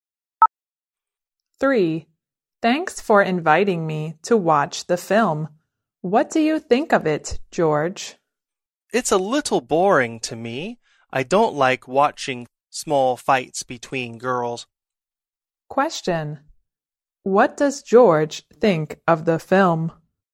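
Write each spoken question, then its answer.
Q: What does George think of the film?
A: A little boring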